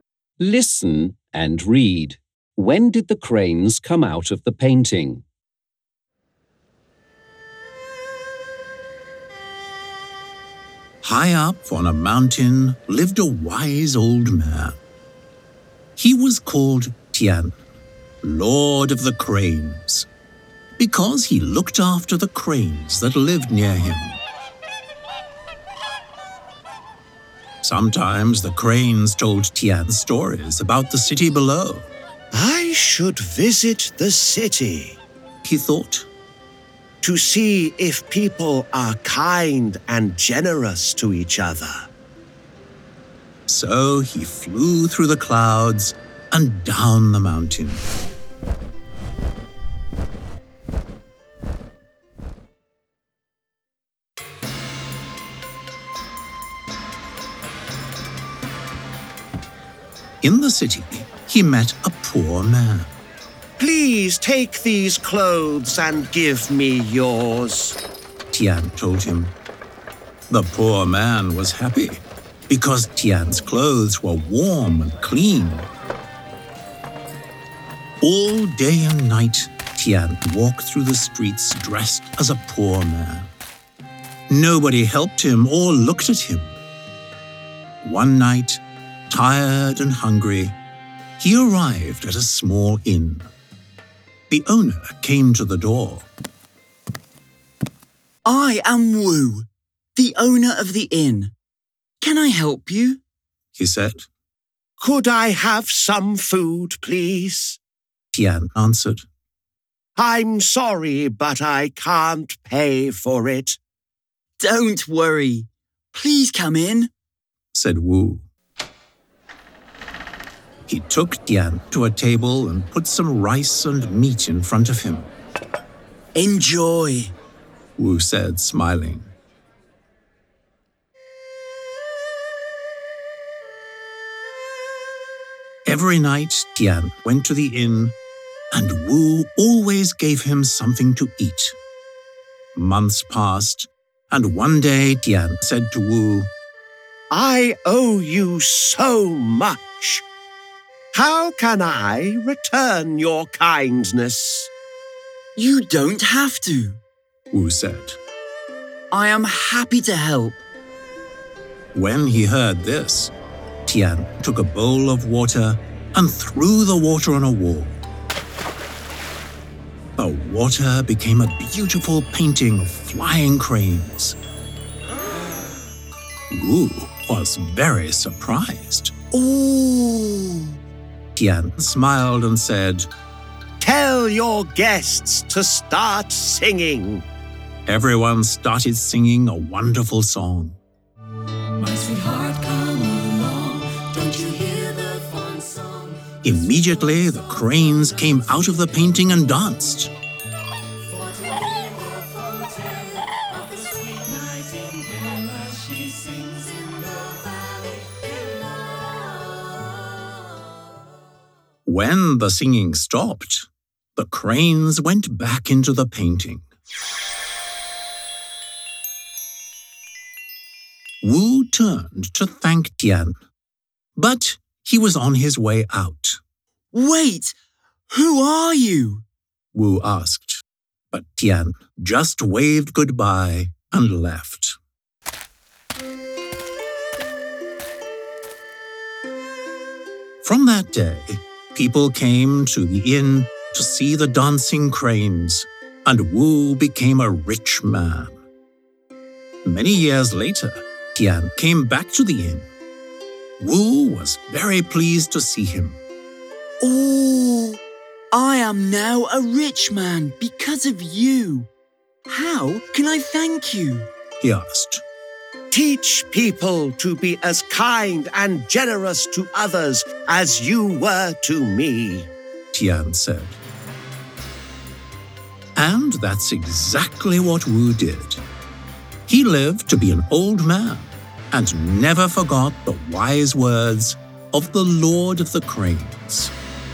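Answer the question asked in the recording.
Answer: When the guests started singing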